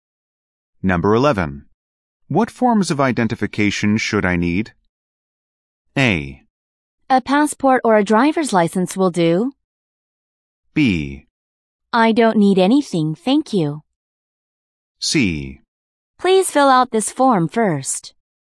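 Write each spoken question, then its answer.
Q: What forms of identification should I need?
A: A: A passport or a driver's license will do.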